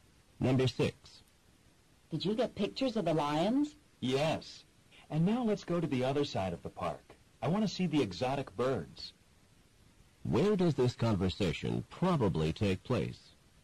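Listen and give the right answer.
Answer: At a zoo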